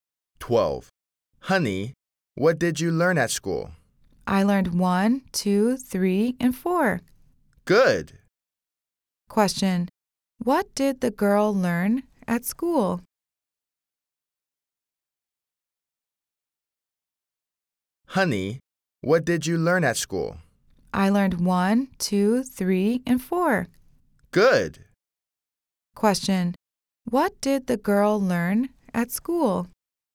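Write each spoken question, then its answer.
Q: Question. What did the girl learn at school?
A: Numbers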